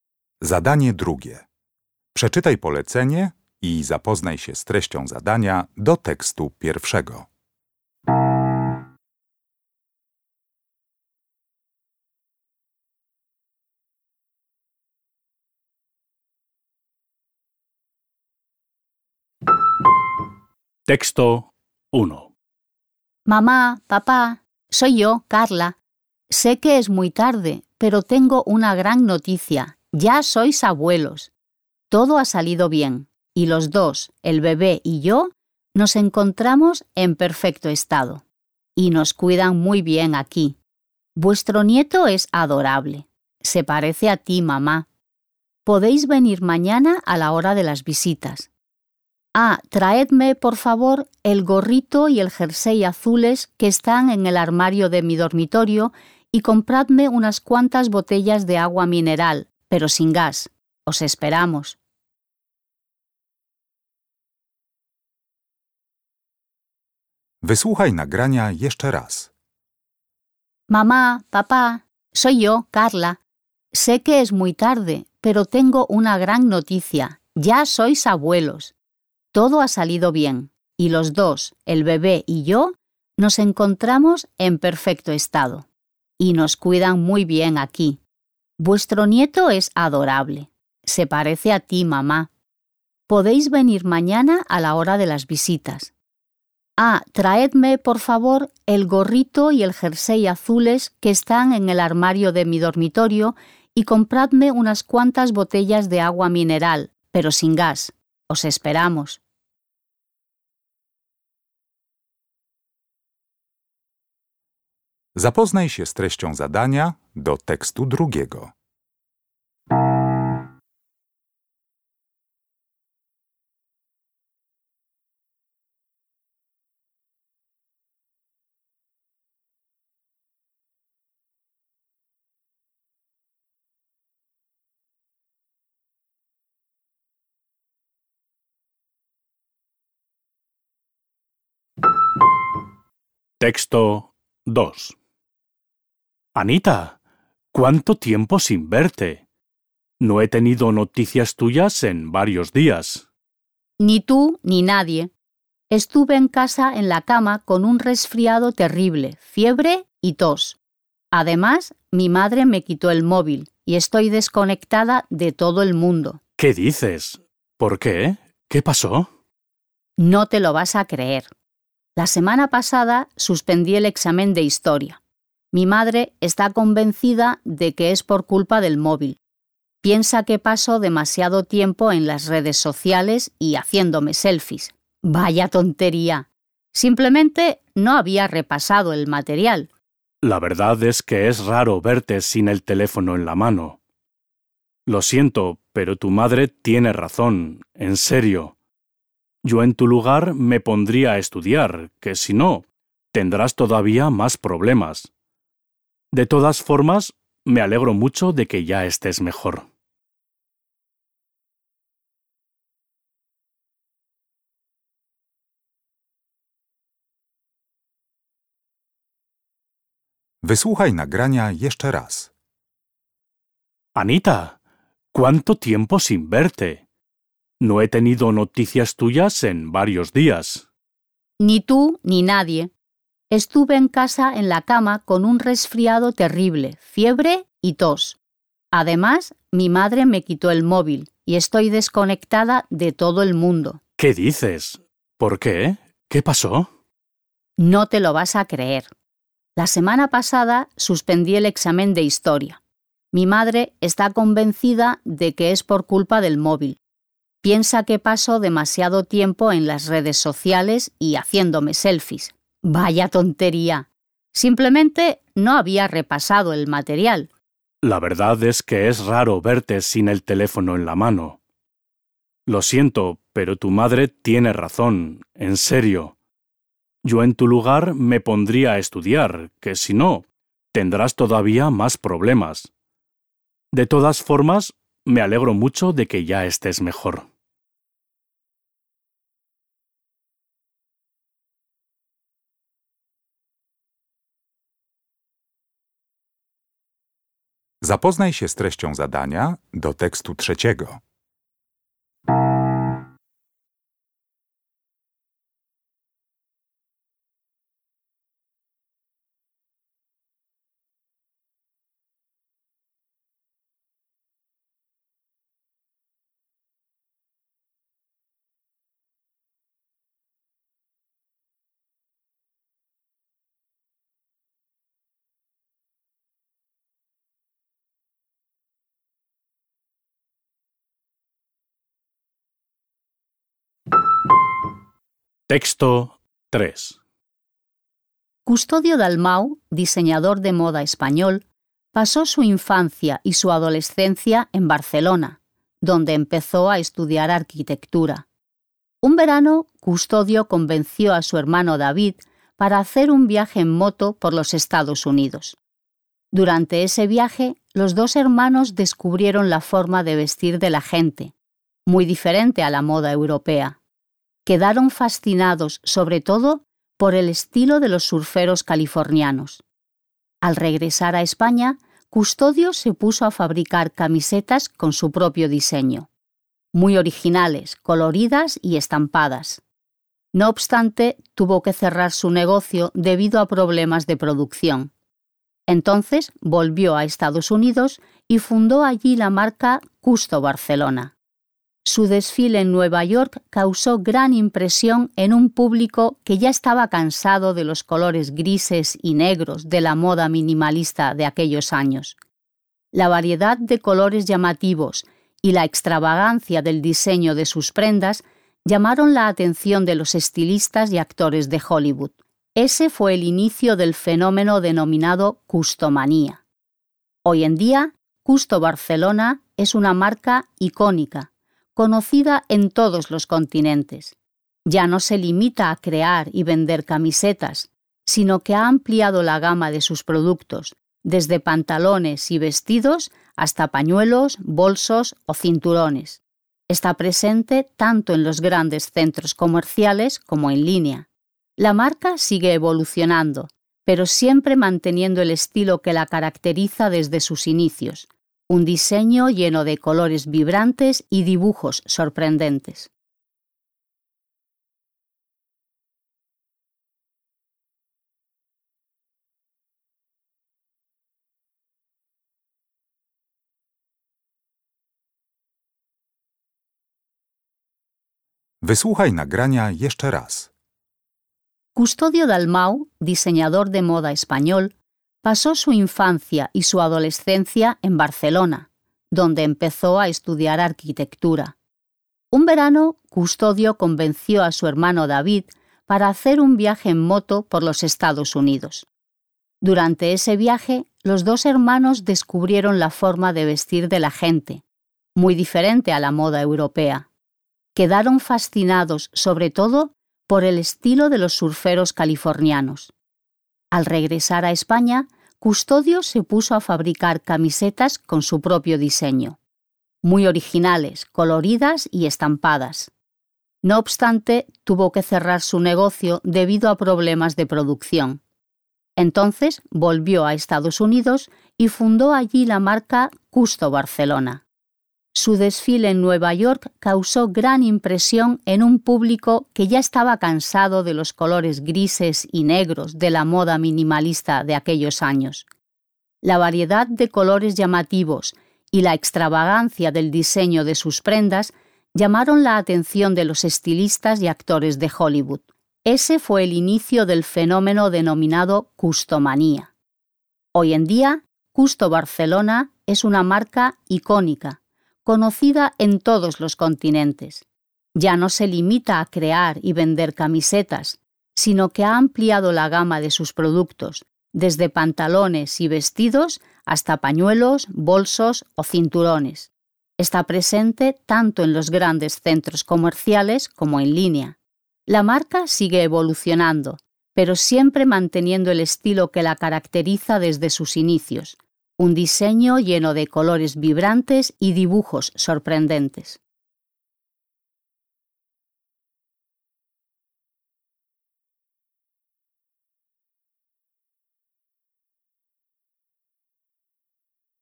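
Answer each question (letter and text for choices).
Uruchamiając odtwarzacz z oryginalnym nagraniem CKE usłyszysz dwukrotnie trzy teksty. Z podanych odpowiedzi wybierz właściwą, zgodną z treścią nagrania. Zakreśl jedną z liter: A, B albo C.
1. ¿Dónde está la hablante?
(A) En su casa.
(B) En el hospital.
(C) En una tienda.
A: (B) En el hospital.

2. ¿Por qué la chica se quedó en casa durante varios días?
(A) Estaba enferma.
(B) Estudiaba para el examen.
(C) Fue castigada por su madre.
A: (A) Estaba enferma.

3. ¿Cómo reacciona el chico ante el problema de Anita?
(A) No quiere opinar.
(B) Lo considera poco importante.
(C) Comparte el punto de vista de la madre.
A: (C) Comparte el punto de vista de la madre.

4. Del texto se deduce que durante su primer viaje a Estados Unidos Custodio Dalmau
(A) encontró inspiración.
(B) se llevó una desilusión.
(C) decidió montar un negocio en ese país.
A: (A) encontró inspiración.

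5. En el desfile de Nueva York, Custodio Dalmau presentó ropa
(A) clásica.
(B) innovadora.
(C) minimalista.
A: (B) innovadora.

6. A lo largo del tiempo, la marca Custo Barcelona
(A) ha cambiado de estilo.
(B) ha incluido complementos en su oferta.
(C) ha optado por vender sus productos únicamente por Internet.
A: (B) ha incluido complementos en su oferta.

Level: Poziom: podstawowy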